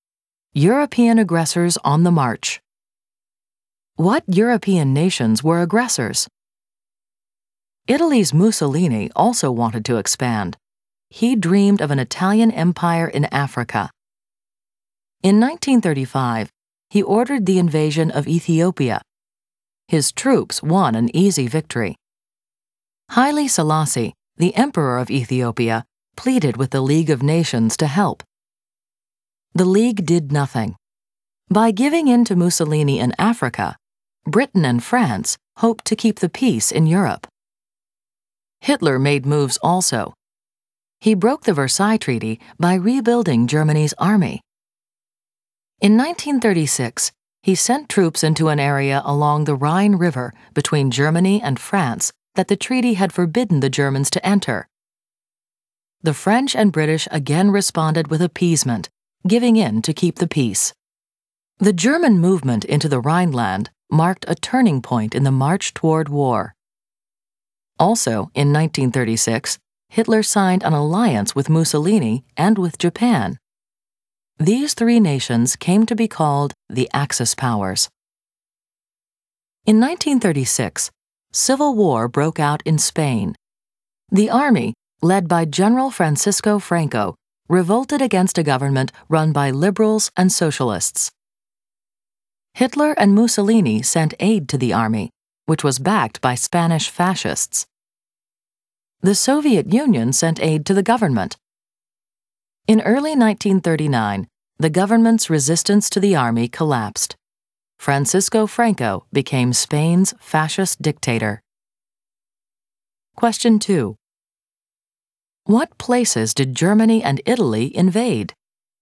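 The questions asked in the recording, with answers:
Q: What places did Germany and Italy invade?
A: Italy invaded Ethiopia; Germany sent troops into the Rhineland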